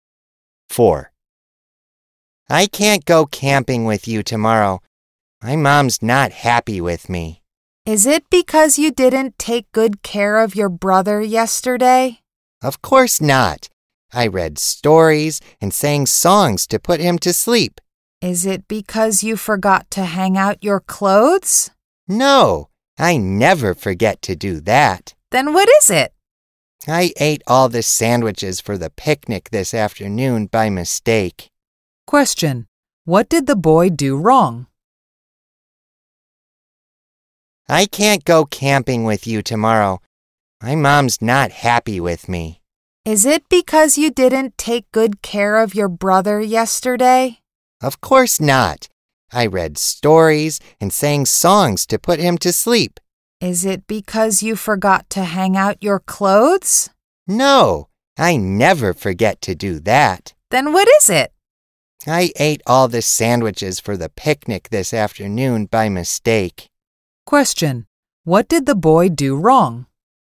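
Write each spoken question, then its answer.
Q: Question, what did the boy do wrong?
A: He ate all the sandwiches for the picnic by mistake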